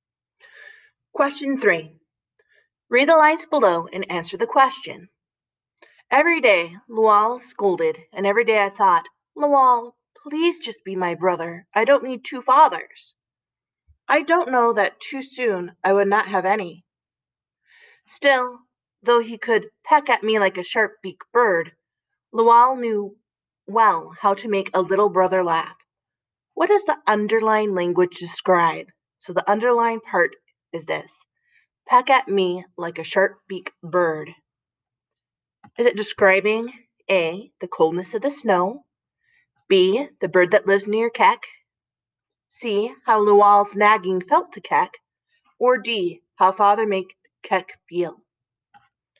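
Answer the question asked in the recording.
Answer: C: how Lual's nagging felt to Keck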